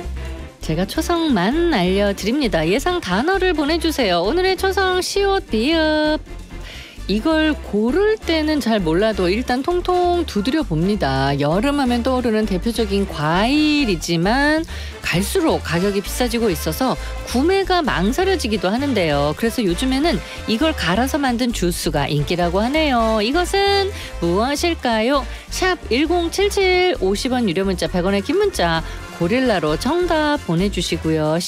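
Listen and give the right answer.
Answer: 수박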